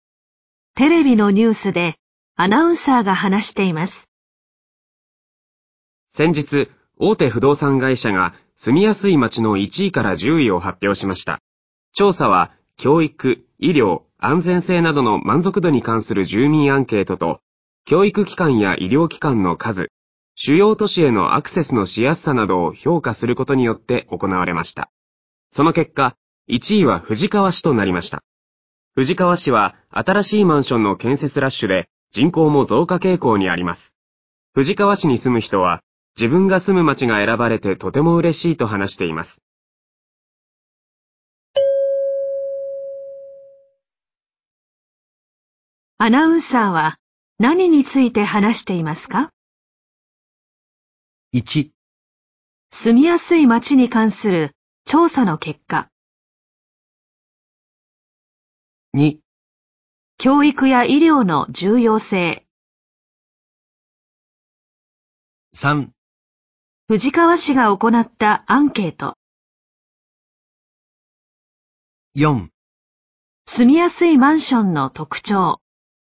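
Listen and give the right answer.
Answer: 1: 住みやすい町に関する調査の結果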